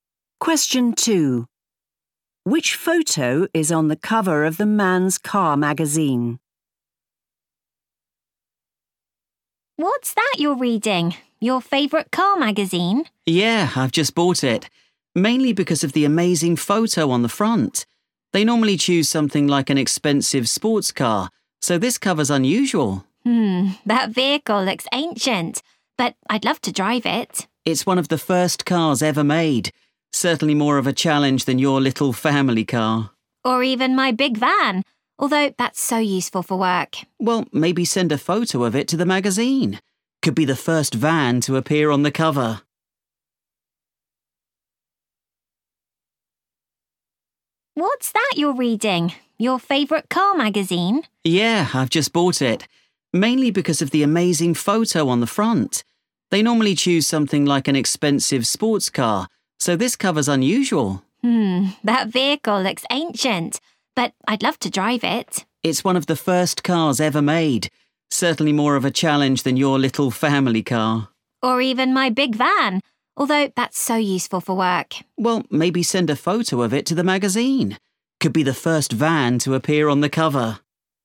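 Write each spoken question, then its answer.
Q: Which photo is on the cover of the Man's Car magazine?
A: a very old car, one of the first cars ever made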